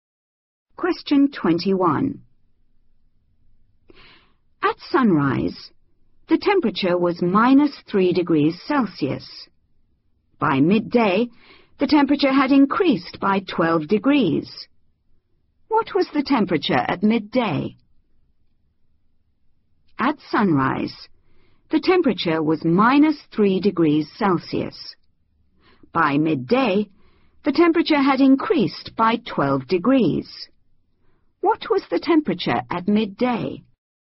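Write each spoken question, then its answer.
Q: What was the temperature at midday?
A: 9 degrees Celsius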